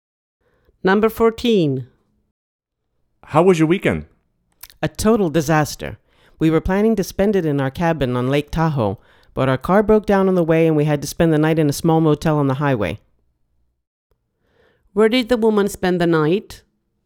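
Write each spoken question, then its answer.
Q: Where did the woman spend the night?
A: In a small motel on the highway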